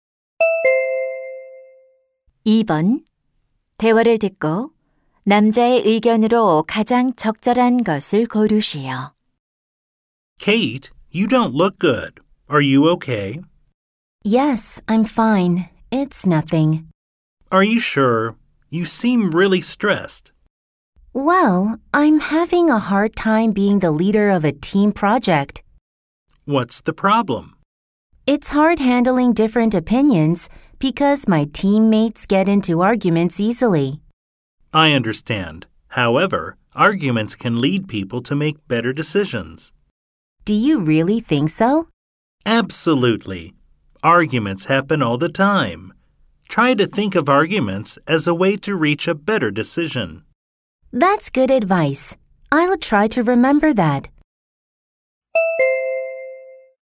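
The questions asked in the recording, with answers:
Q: 대화를 듣고 남자의 의견으로 가장 적절한 것을 고르시오.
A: 논쟁은 더 나은 결정을 내리는 데 도움이 될 수 있다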